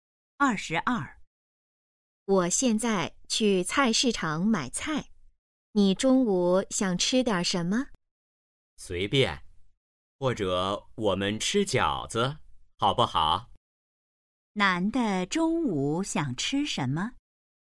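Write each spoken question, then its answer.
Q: 男的中午想吃什么?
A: 饺子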